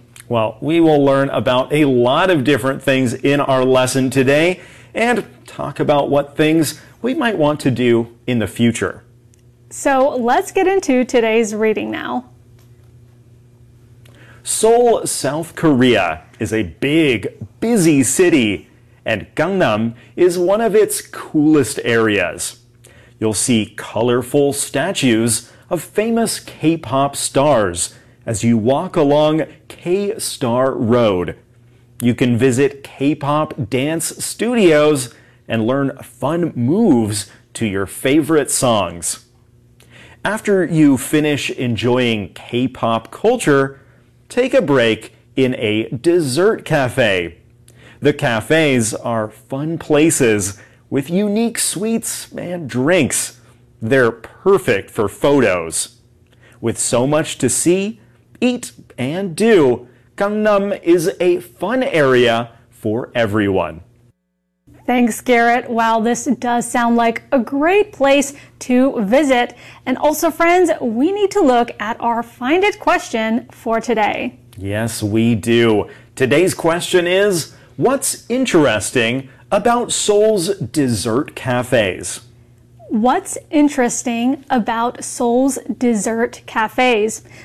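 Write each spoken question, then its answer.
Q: What's interesting about Seoul's dessert cafes?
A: They are fun places with unique sweets and drinks, perfect for photos.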